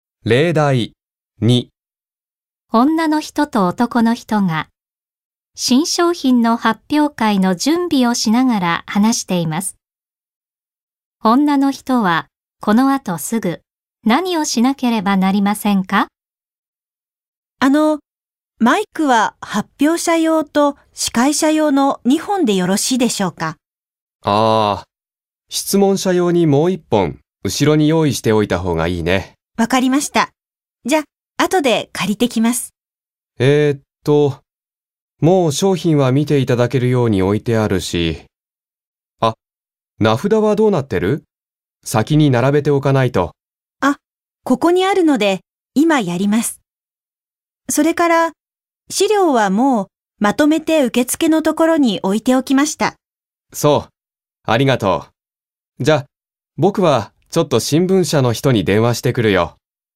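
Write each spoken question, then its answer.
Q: 女の人はこの後すぐ何をしなければなりませんか?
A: 名札を並べる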